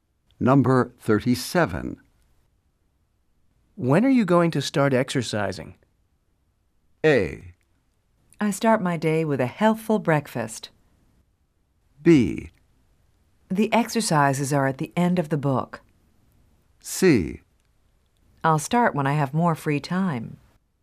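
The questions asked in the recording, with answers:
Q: When are you going to start exercising?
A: C: I'll start when I have more free time.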